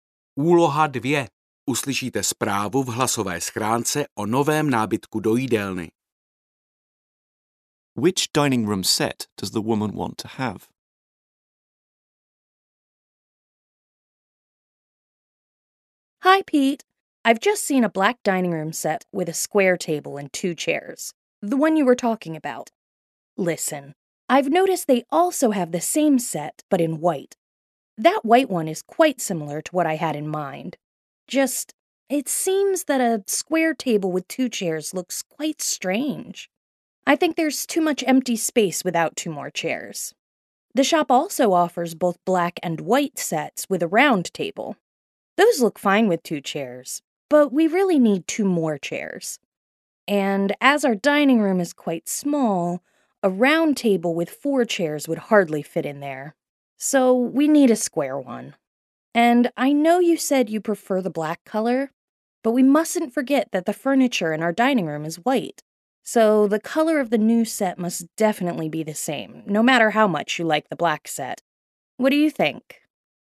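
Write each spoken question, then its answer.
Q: Which dining room set does the woman want to have?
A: A white set with a square table and four chairs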